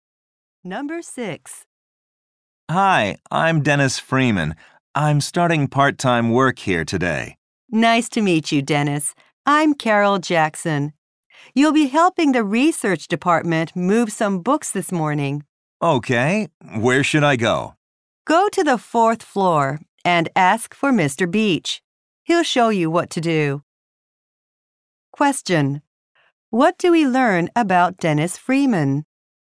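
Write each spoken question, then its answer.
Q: What do we learn about Dennis Freeman?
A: He is starting part-time work today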